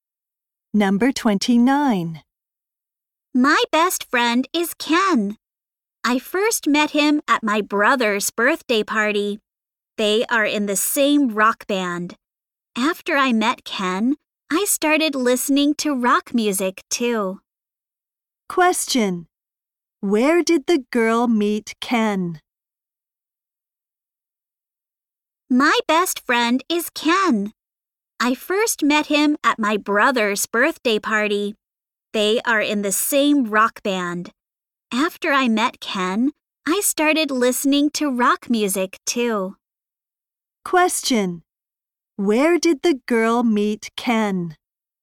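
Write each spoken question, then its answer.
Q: Where did the girl meet Ken?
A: At her brother's birthday party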